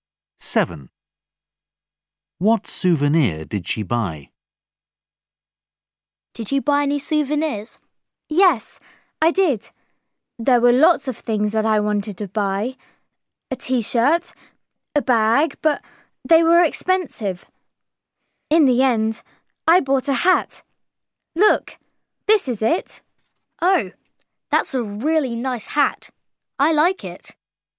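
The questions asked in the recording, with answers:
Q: What souvenir did she buy?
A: A hat.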